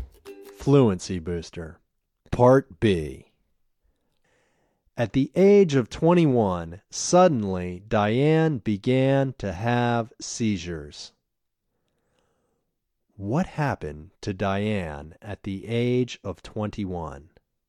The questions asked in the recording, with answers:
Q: What happened to Diane at the age of 21?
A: At the age of 21, Diane suddenly began to have seizures.